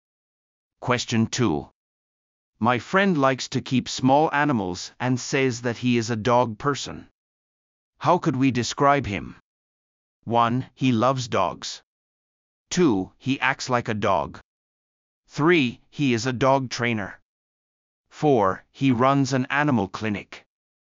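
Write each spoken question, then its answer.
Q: How could we describe him?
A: 1: He loves dogs.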